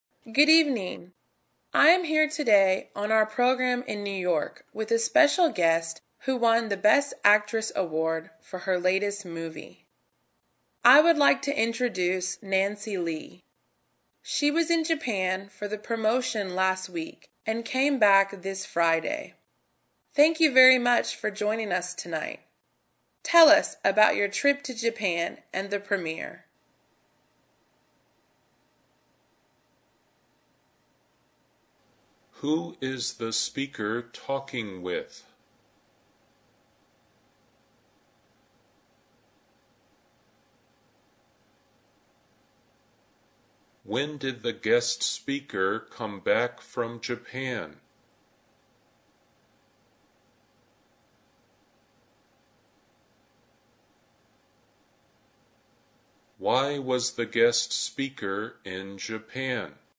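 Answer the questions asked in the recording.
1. Nancy Lee, an award-winning actress
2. This Friday
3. To promote her latest movie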